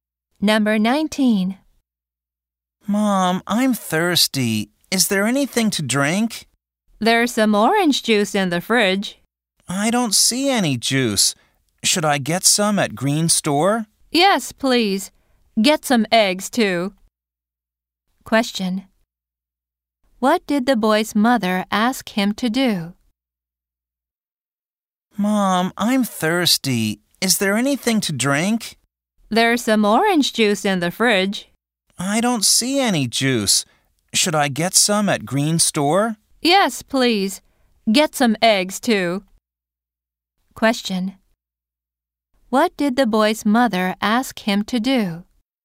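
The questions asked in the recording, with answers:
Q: What did the boy's mother ask him to do?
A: Buy juice and eggs at Green Store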